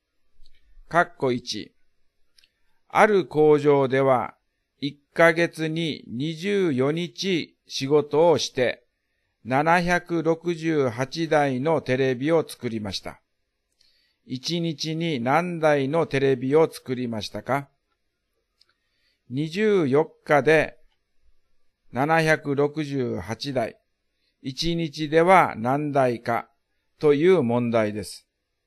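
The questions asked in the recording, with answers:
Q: 1日に何台のテレビを作りましたか?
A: 32台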